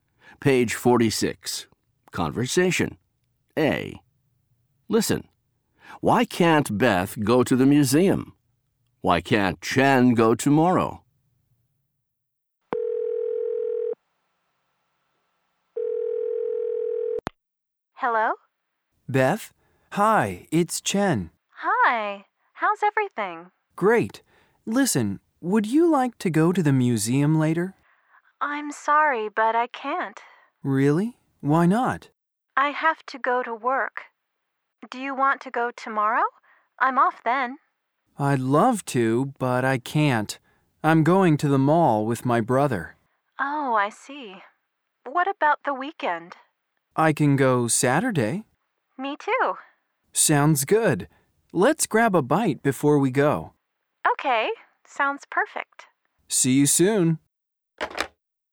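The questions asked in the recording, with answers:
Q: Why can't Beth go to the museum?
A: She has to go to work.

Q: Why can't Chen go tomorrow?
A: He's going to the mall with his brother.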